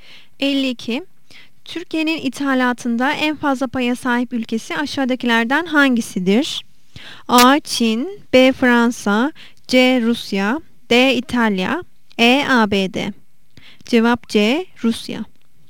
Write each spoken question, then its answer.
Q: Türkiye'nin ithalatında en fazla paya sahip ülkesi aşağıdakilerden hangisidir?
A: Cevap C. Rusya.